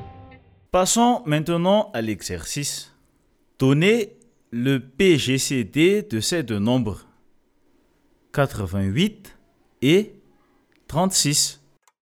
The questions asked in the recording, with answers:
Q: Donnez le PGCD de ces deux nombres, 88 et 36.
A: Le PGCD de 88 et 36 est égal à 2 au carré est égal 4.